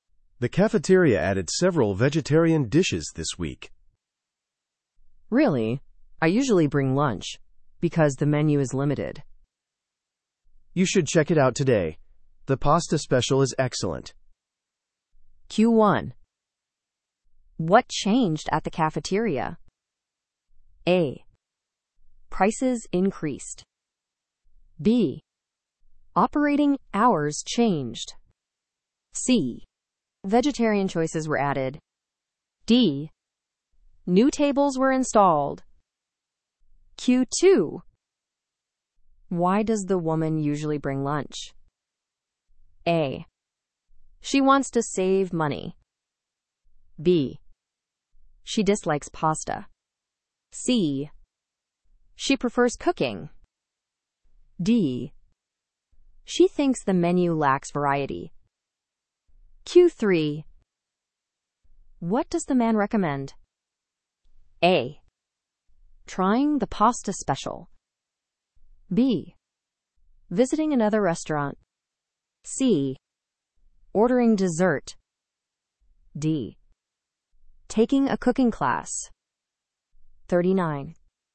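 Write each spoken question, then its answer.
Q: What changed at the cafeteria?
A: C: Vegetarian choices were added.

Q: Why does the woman usually bring lunch?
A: D: She thinks the menu lacks variety.

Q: What does the man recommend?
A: A: Trying the pasta special.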